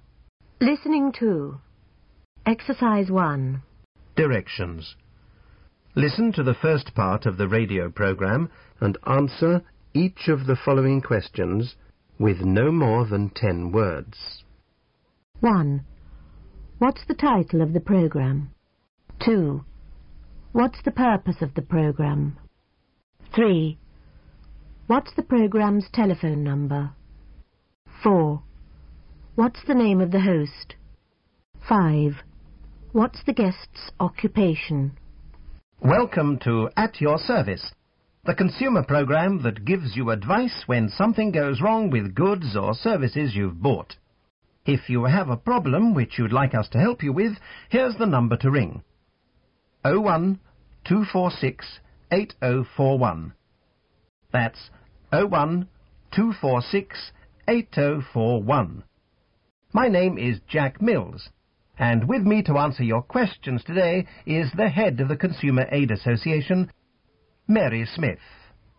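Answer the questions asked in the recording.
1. At Your Service
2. To give consumers advice when something goes wrong with goods or services they've bought
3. 01-246-8041
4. Jack Mills
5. Head of the Consumer Aid Association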